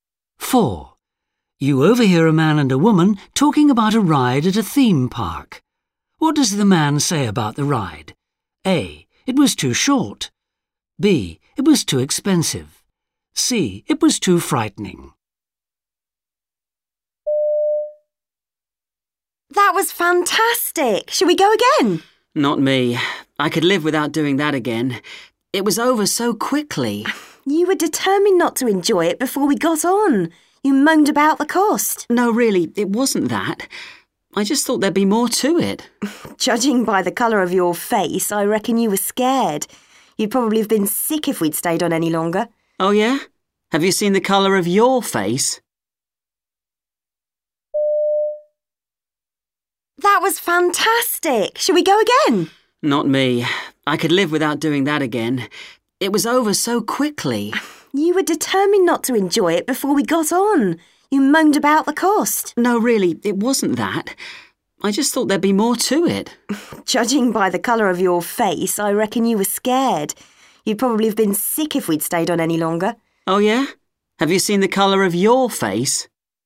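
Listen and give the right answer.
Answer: A: It was too short.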